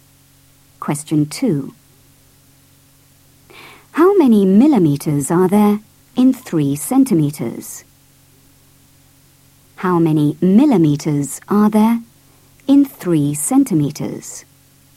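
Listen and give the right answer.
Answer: 30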